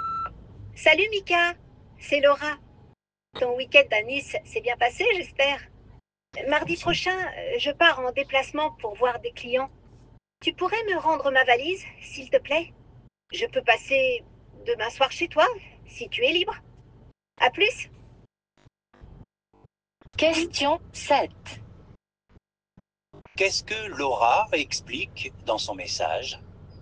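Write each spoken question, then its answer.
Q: Qu'est-ce que Laura explique dans son message?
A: Elle a besoin de récupérer sa valise pour un déplacement professionnel mardi prochain.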